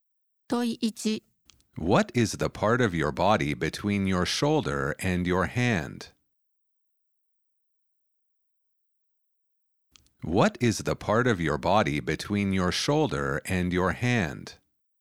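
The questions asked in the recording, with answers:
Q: What is the part of your body between your shoulder and your hand?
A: the arm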